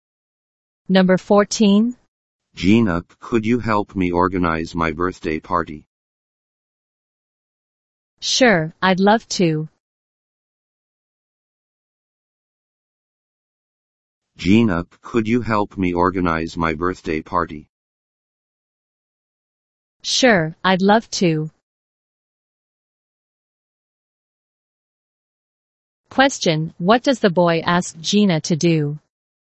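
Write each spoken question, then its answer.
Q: what does the boy ask Gina to do?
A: Help him organize his birthday party.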